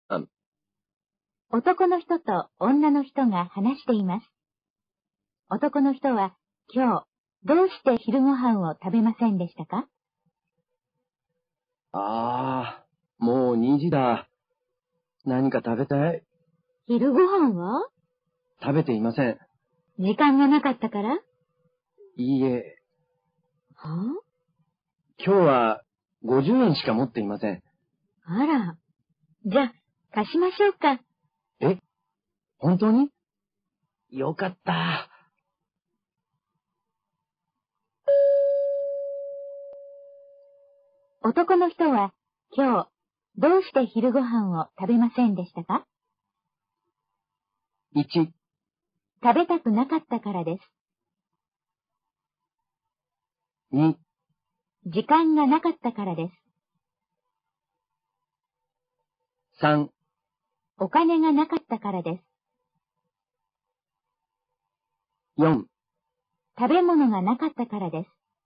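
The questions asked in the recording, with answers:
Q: 男の人は、今日、どうして昼ご飯を食べませんでしたか?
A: 3: お金がなかったからです。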